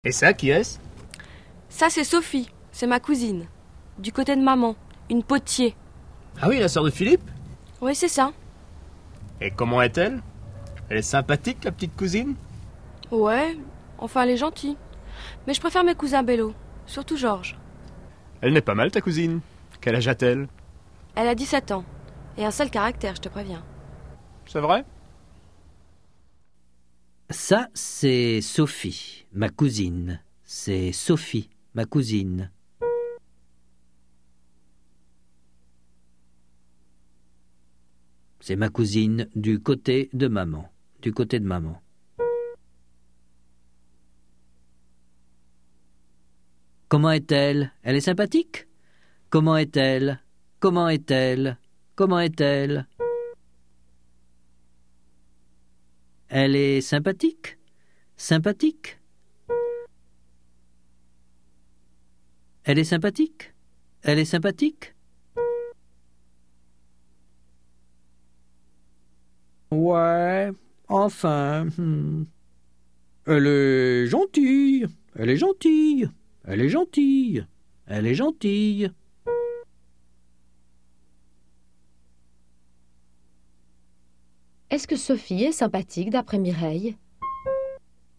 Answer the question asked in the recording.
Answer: Oui, enfin.